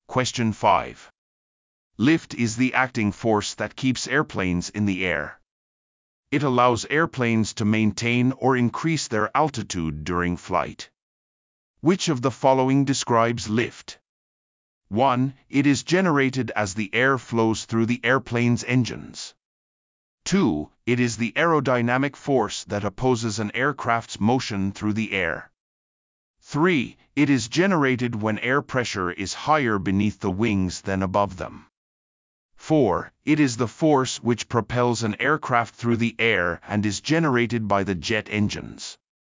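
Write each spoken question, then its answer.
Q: Which of the following describes lift?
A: 3: It is generated when air pressure is higher beneath the wings than above them.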